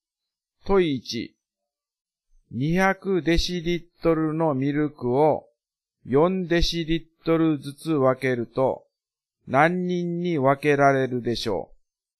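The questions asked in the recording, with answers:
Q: 200デシリットルのミルクを4デシリットルリットルずつ分けると何人に分けられるでしょう。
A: 50人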